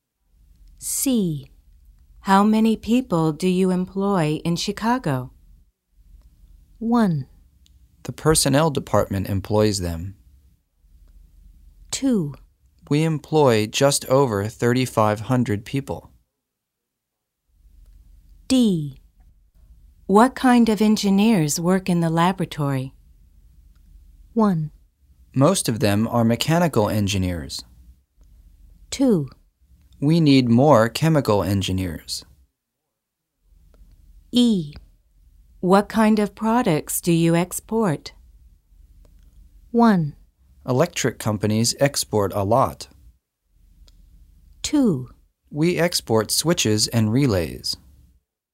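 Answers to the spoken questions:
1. 2: We employ just over 3,500 people.
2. 1: Most of them are mechanical engineers.
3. 2: We export switches and relays.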